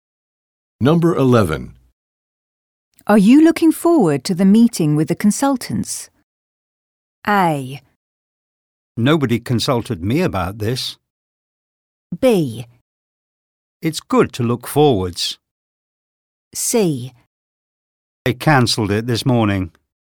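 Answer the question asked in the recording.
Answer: C: They cancelled it this morning.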